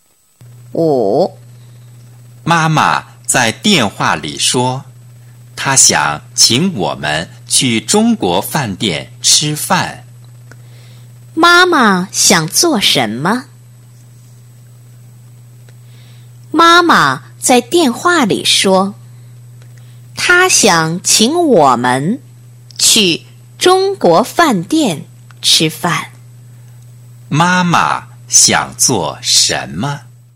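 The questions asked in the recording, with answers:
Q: 妈妈想做什么?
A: 请他们去中国饭店吃饭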